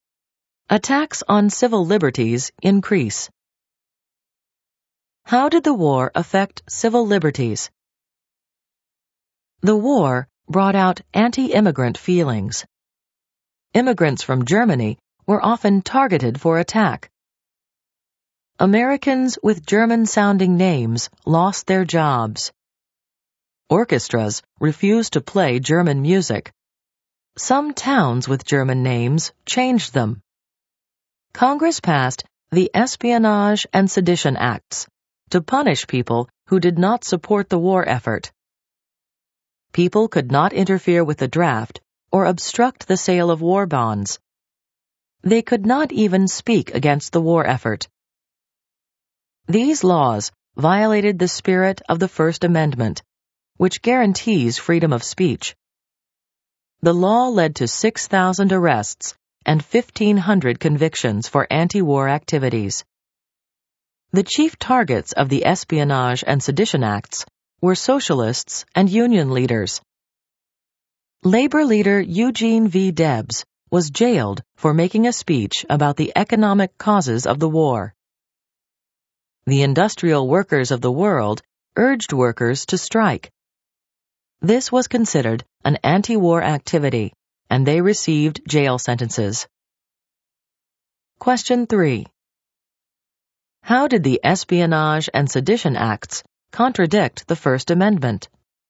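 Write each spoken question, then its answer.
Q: How did the Espionage and Sedition Acts contradict the First Amendment?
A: They punished people for speaking against the war, violating freedom of speech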